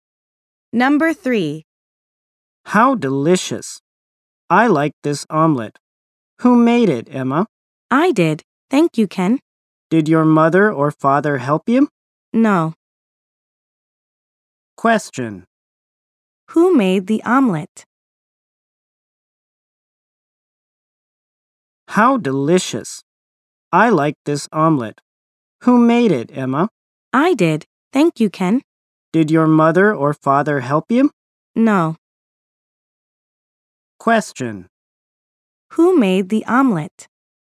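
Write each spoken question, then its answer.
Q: Who made the omelet?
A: Emma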